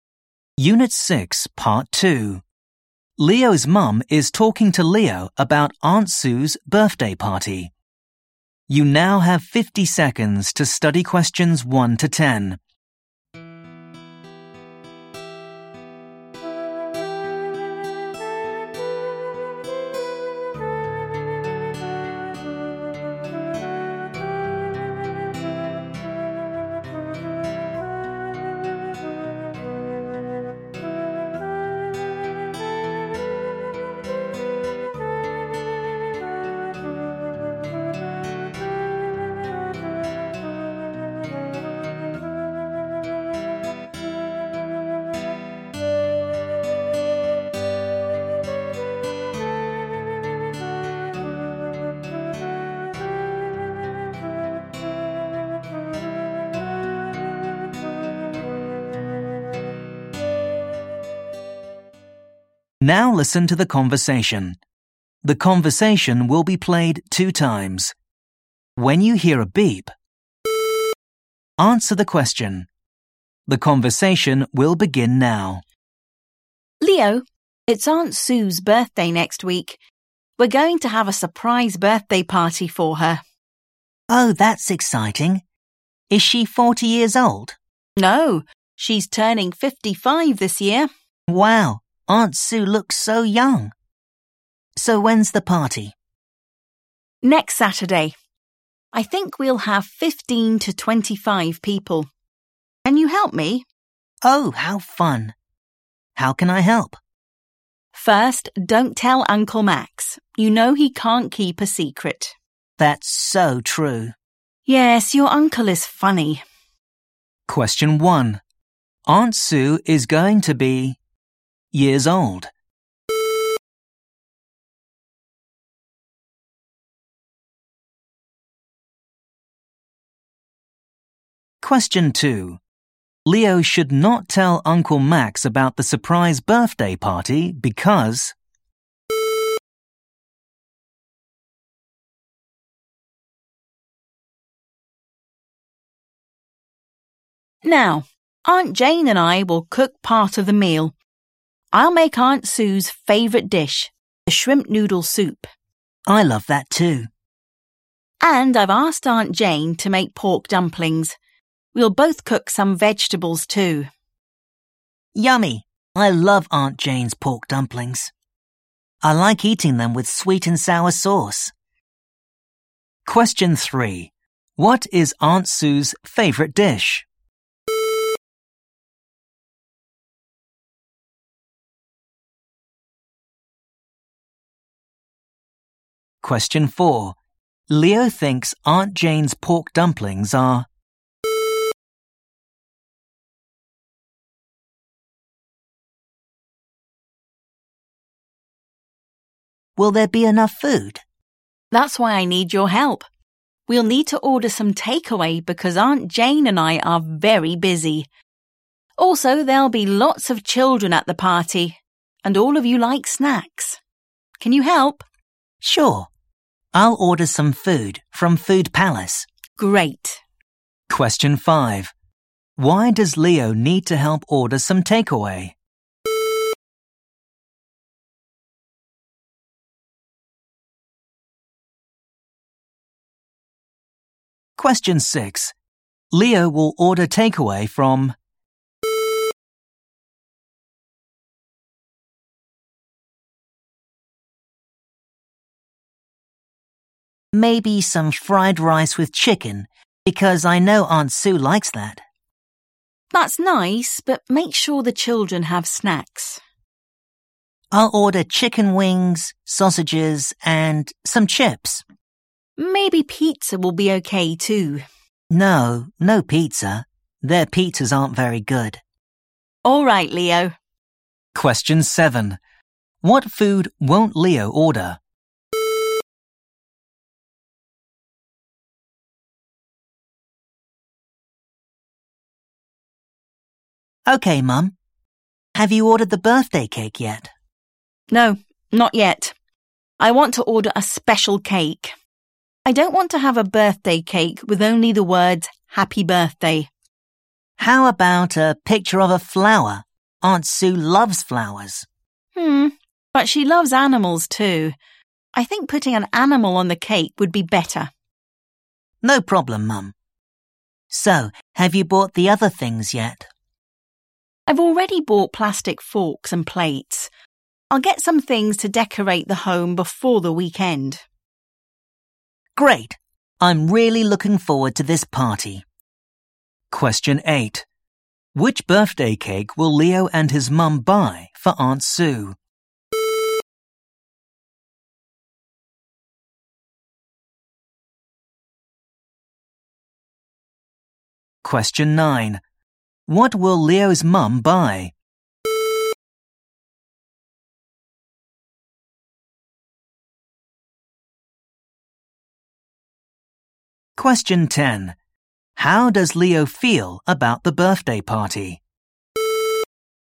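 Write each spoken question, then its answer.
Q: Aunt Sue is going to be... years old.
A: 55

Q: Leo should not tell Uncle Max about the surprise birthday party because...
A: he can't keep a secret

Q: What is Aunt Sue's favourite dish?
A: shrimp noodle soup

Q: Leo thinks Aunt Jane's pork dumplings are...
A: yummy

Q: Why does Leo need to help order some takeaway?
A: his mum and Aunt Jane are very busy

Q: Leo will order takeaway from...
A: Food Palace

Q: What food won't Leo order?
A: pizza

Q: Which birthday cake will Leo and his mum buy for Aunt Sue?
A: a cake with an animal on it

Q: What will Leo's mum buy?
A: things to decorate the home

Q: How does Leo feel about the birthday party?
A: he's really looking forward to it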